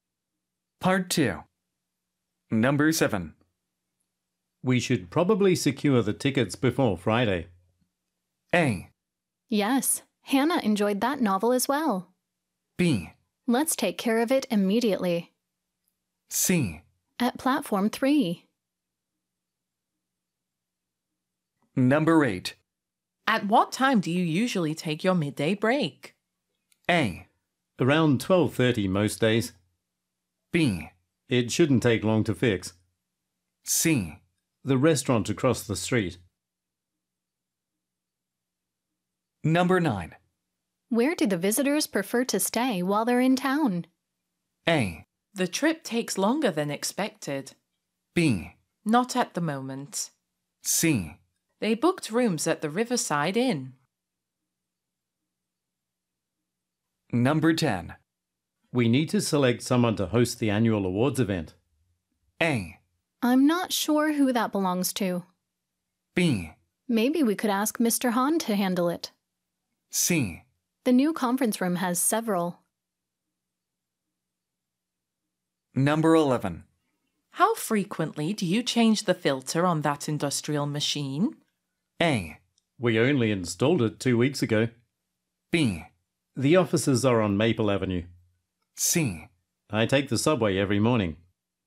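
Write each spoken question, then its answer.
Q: We should probably secure the tickets before Friday.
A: B: Let's take care of it immediately.

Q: At what time do you usually take your midday break?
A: A: Around 12:30 most days.

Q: Where do the visitors prefer to stay while they're in town?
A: C: They booked rooms at the Riverside Inn.

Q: We need to select someone to host the annual awards event.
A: B: Maybe we could ask Mr. Hahn to handle it.

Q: How frequently do you change the filter on that industrial machine?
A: A: We only installed it 2 weeks ago.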